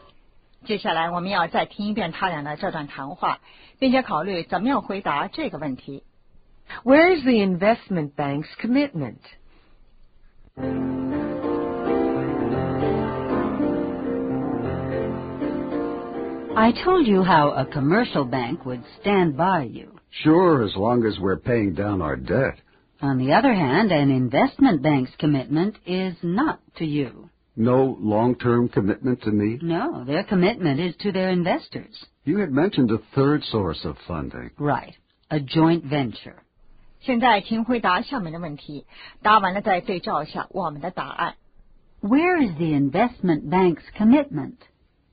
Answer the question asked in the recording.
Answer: To their investors.